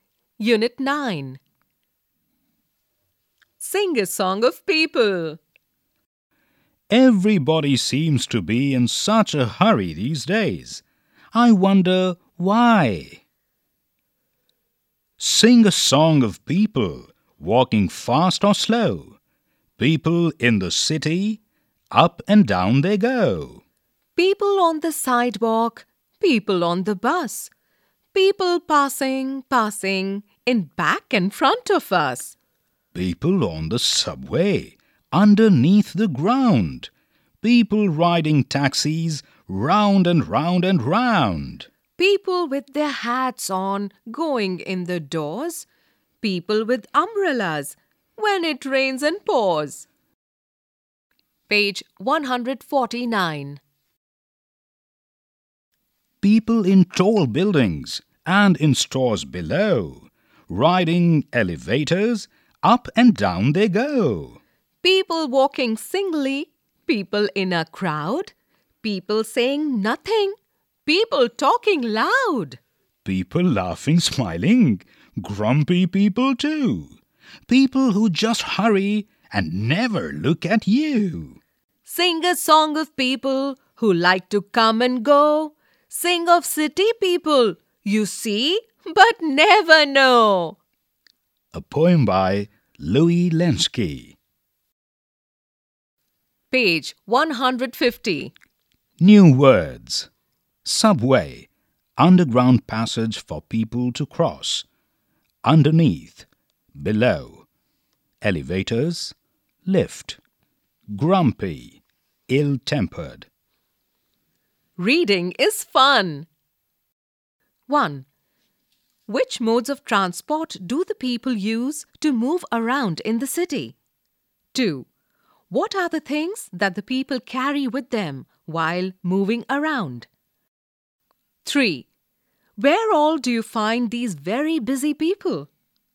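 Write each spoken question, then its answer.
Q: Which modes of transport do the people use to move around in the city?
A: Walking, buses, the subway, taxis and elevators

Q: What are the things that the people carry with them while moving around?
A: Umbrellas (and they wear hats)

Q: Where all do you find these very busy people?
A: In the city: on sidewalks, buses, the subway, taxis, tall buildings, stores and elevators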